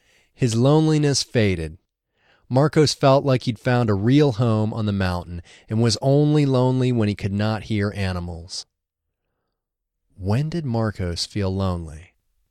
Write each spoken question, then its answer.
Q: When did Marcos feel lonely?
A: He only felt lonely when he could not hear animals.